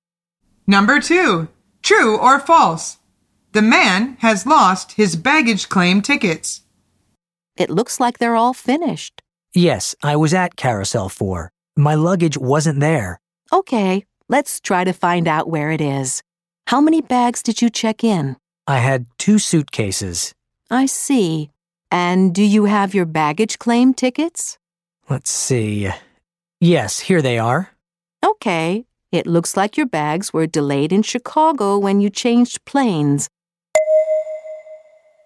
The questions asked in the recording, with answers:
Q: True or false? The man has lost his baggage claim tickets.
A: The answer is false.